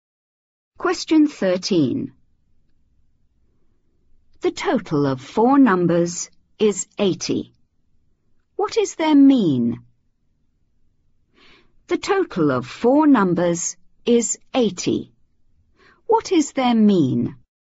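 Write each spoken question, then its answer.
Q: What is their mean?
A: 20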